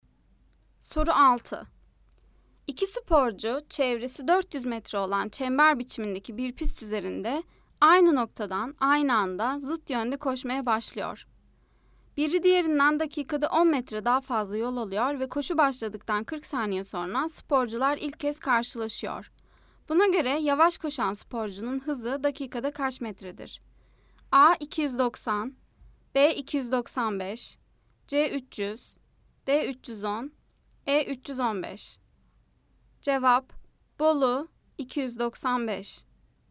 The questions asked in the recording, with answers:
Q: Buna göre yavaş koşan sporcunun hızı dakikada kaç metredir?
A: Cevap: Bolu 295.